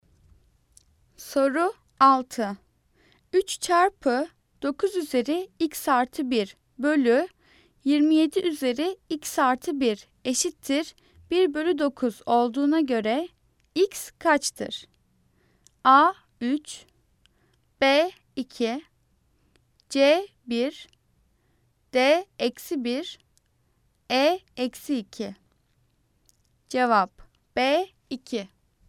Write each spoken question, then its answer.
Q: 3 çarpı 9 üzeri x artı 1 bölü 27 üzeri x artı 1 eşittir 1 bölü 9 olduğuna göre x kaçtır?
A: Cevap B 2.